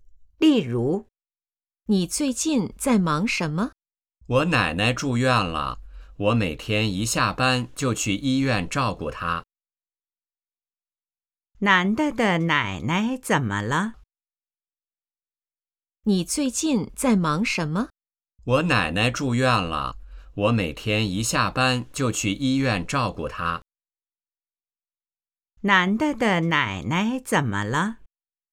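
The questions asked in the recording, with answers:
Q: 男的的奶奶怎么了?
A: 住院了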